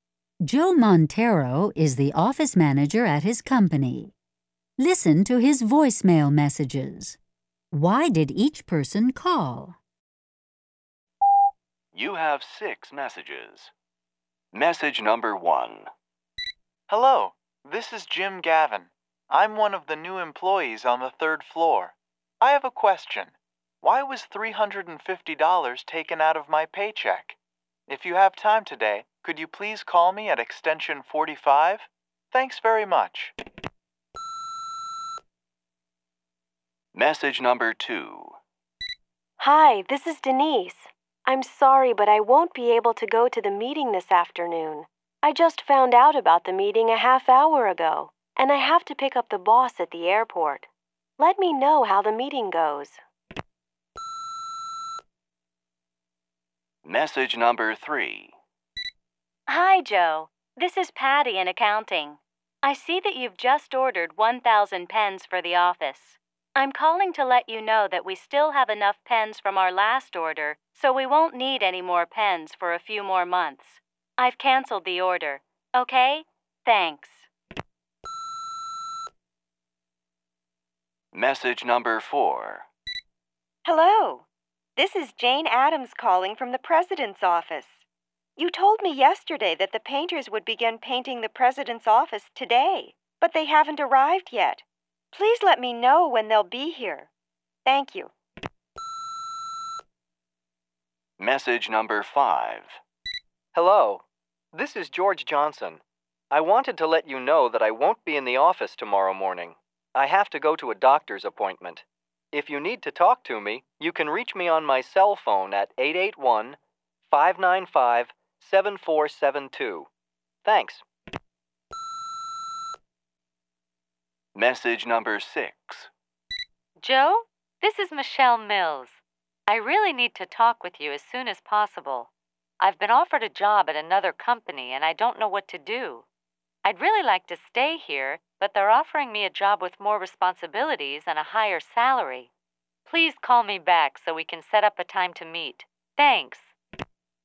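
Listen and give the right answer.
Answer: 1 Jim: ask why $350 was taken from his paycheck; 2 Denise: can't attend meeting; 3 Patty: canceled pen order; 4 Jane: painters haven't arrived; 5 George: out tomorrow morning for doctor; 6 Michelle: wants to meet about job offer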